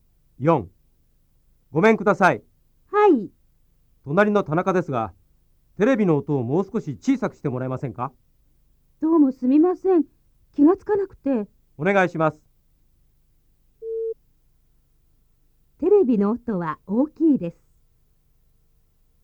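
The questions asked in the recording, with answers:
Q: テレビの音は大きいです。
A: ○(正しい)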